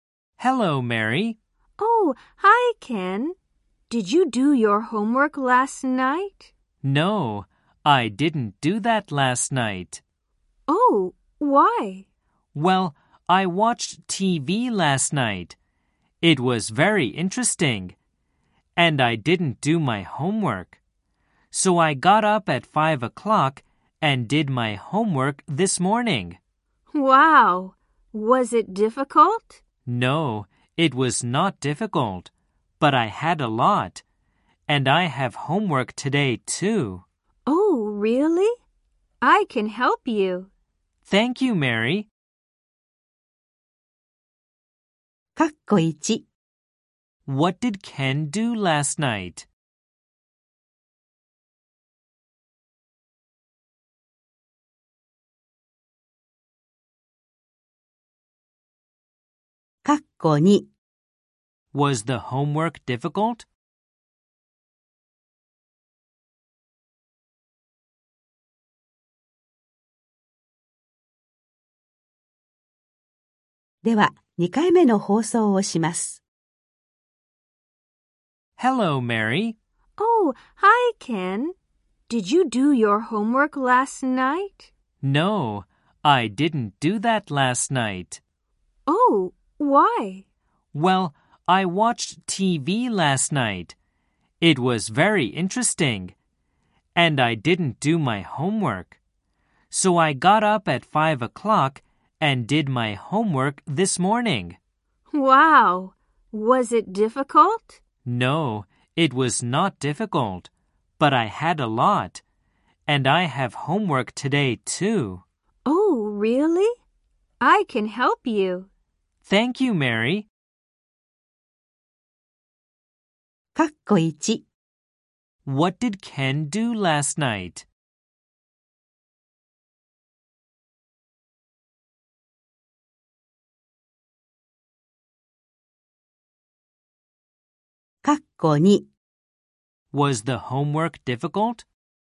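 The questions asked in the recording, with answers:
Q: What did Ken do last night?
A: He watched TV.

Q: Was the homework difficult?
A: No, it was not.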